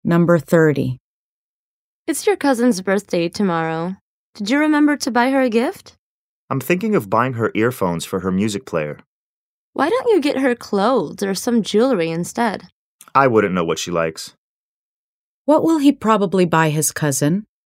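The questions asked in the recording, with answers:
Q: What will he probably buy his cousin?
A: Earphones for her music player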